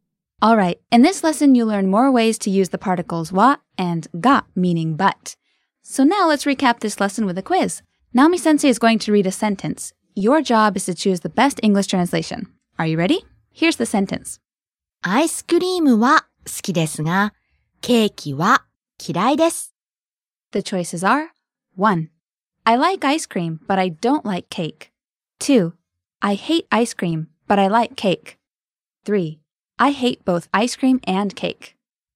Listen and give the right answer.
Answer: 1. I like ice cream, but I don't like cake.